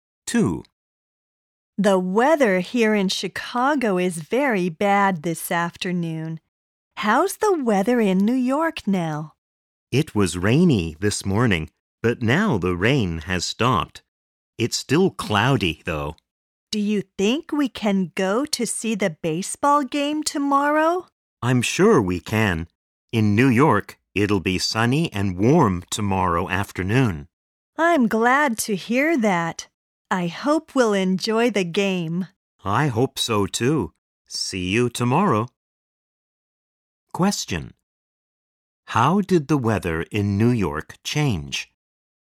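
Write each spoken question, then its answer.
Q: How did the weather in New York change?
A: It was rainy in the morning, but the rain stopped and now it is cloudy.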